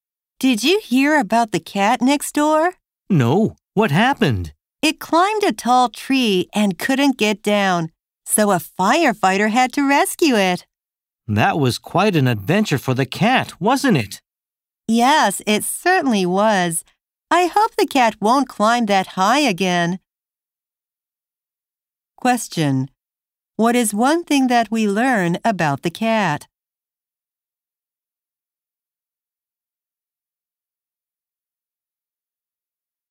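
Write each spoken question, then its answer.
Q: What is one thing that we learn about the cat?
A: It got stuck up a tall tree, and a firefighter had to rescue it.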